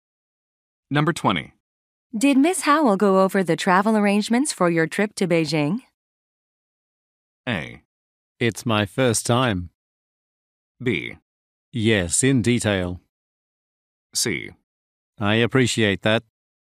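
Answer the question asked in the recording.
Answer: B: Yes, in detail.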